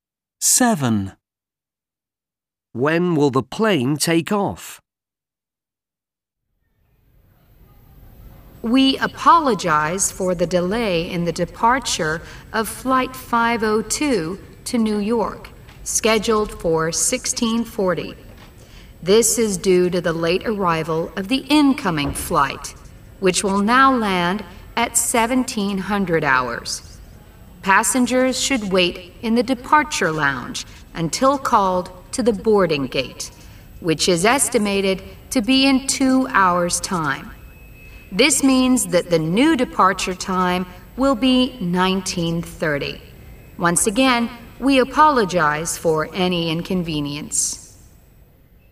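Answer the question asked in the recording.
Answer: 19:30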